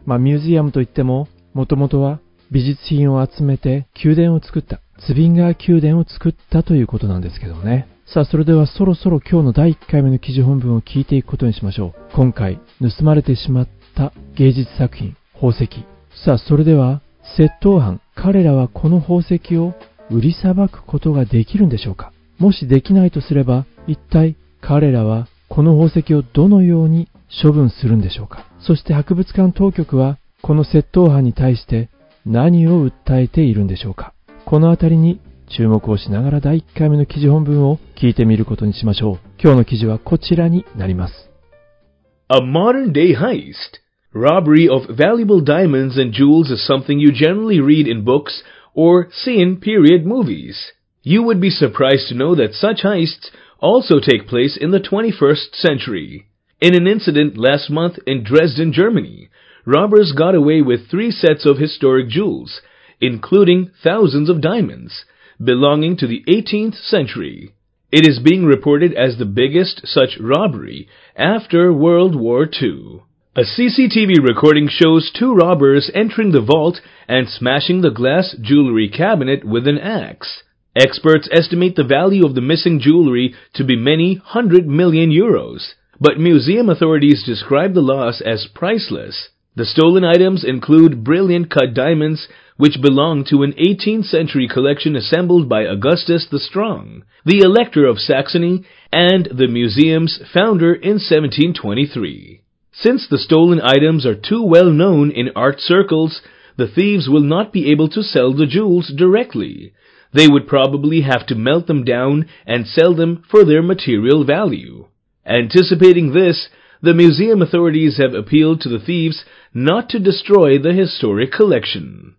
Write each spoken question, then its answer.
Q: さあ、それでは窃盗犯、彼らはこの宝石を売りさばくことができるんでしょうか。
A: The thieves will not be able to sell the jewels directly.

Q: もしできないとすれば、一体彼らはこの宝石をどのように処分するんでしょうか。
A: They would probably have to melt them down and sell them for their material value.